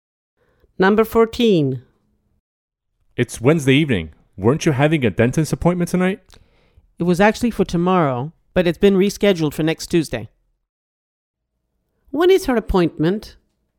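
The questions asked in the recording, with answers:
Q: When is her appointment?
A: next Tuesday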